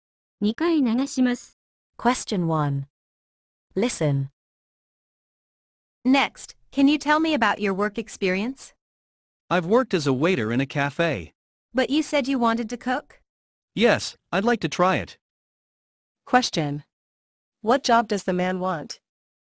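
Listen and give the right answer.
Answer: A cook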